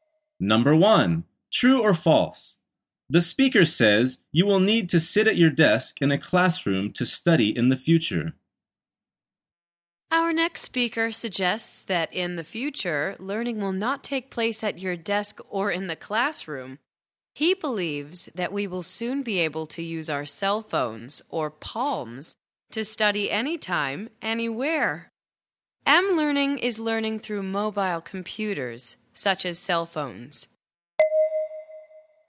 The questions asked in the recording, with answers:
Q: True or false? The speaker says you will need to sit at your desk in a classroom to study in the future.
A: The answer is false.